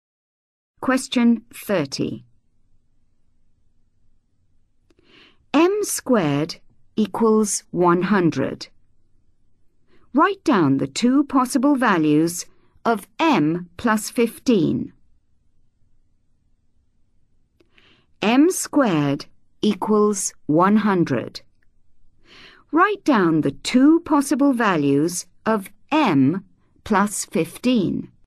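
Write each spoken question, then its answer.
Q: Write down the two possible values of M plus 15.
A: 25 and 5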